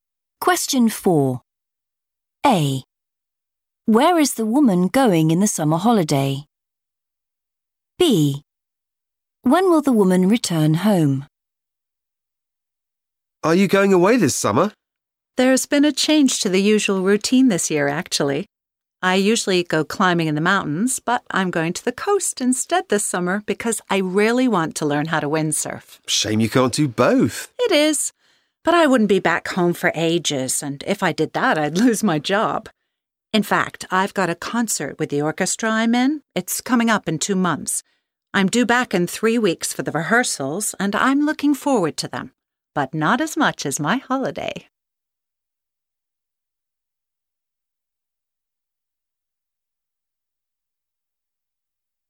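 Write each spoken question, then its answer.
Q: Where is the woman going in the summer holiday?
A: the coast

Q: When will the woman return home?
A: in 3 weeks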